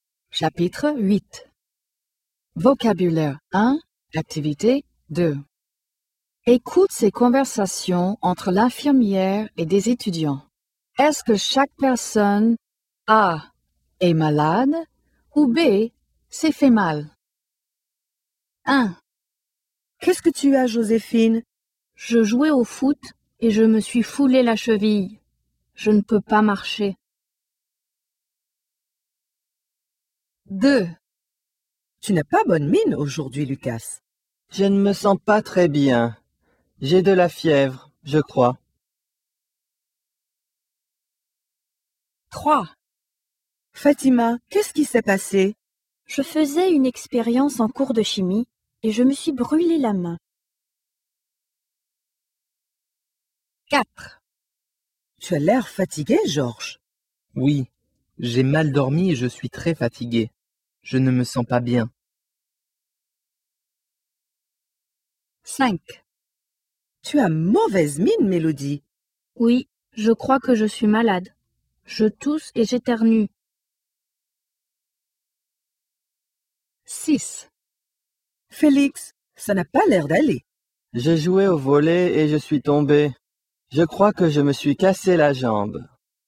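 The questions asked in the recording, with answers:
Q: Est-ce que chaque personne A. est malade ou B. s'est fait mal?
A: B: s'est fait mal

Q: Est-ce que chaque personne A. est malade ou B. s'est fait mal?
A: A: est malade

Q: Est-ce que chaque personne A. est malade ou B. s'est fait mal?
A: B: s'est fait mal

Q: Est-ce que chaque personne A. est malade ou B. s'est fait mal?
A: A: est malade

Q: Est-ce que chaque personne A. est malade ou B. s'est fait mal?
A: A: est malade

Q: Est-ce que chaque personne A. est malade ou B. s'est fait mal?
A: B: s'est fait mal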